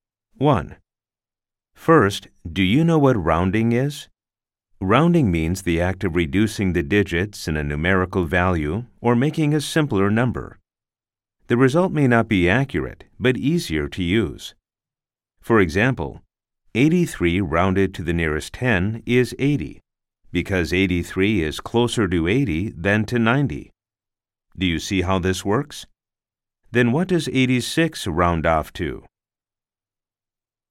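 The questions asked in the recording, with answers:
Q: Then what does 86 round off to?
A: 90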